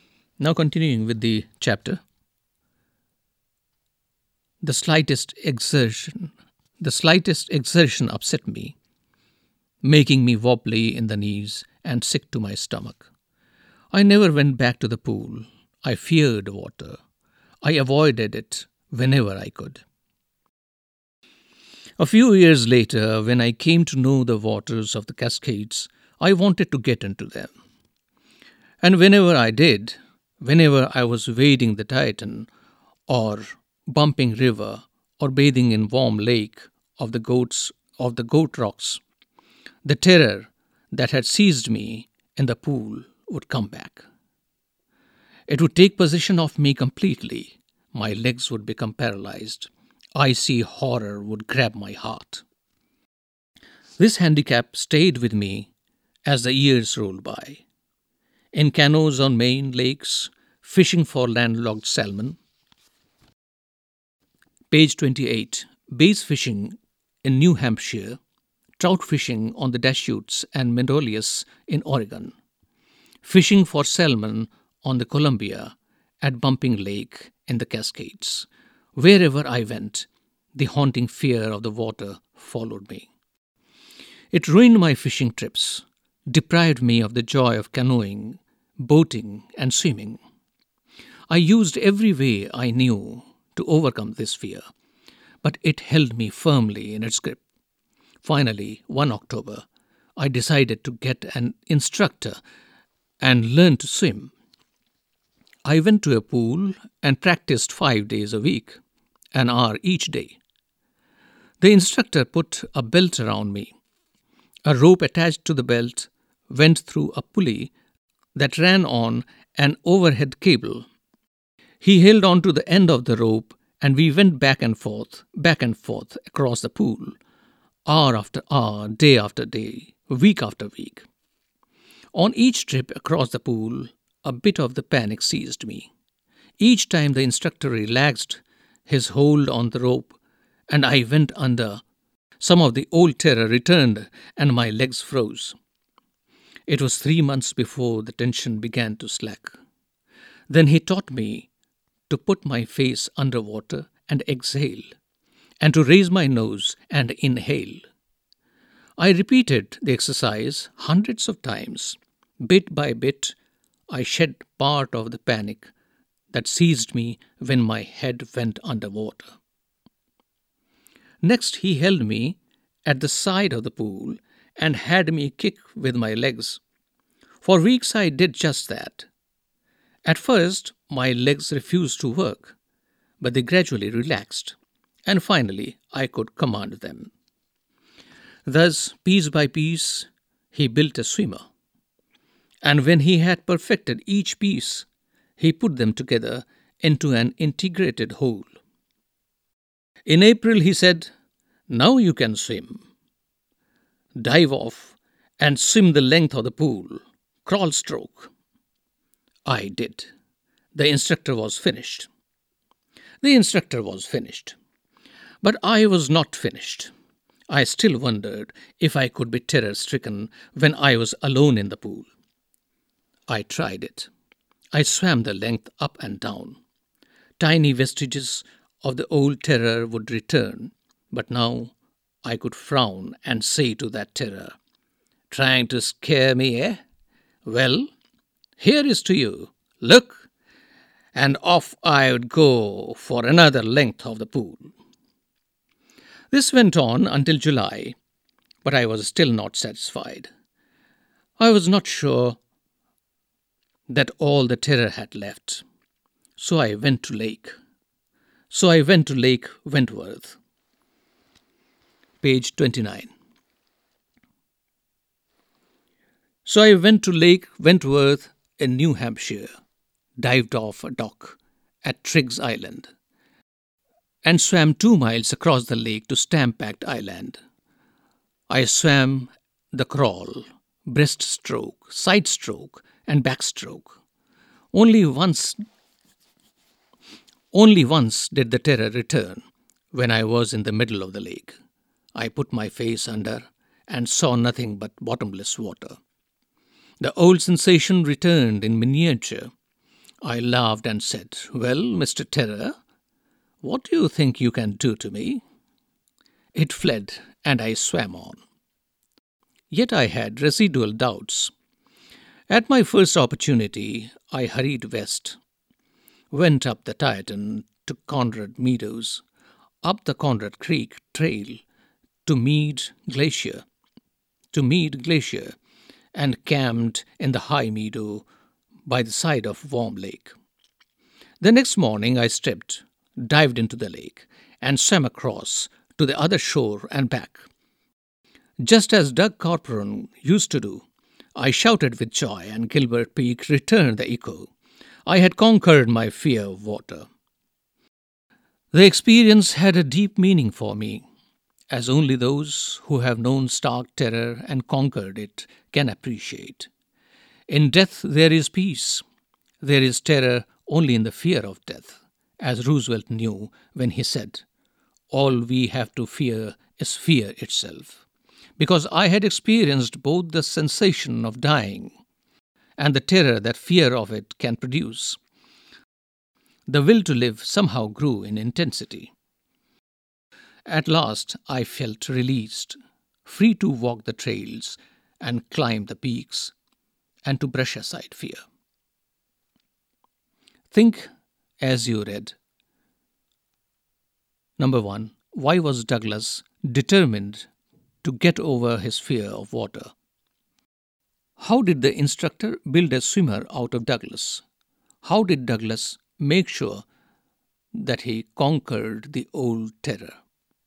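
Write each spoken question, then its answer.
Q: Why was Douglas determined to get over his fear of water?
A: The fear ruined his fishing trips and took away the joy of canoeing, boating and swimming

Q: How did the instructor build a swimmer out of Douglas?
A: Piece by piece: a belt and rope across the pool, breathing with his face underwater, kicking at the side, then putting it all together

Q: How did Douglas make sure that he conquered the old terror?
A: He swam alone in the pool, swam two miles across Lake Wentworth, then swam across Warm Lake and back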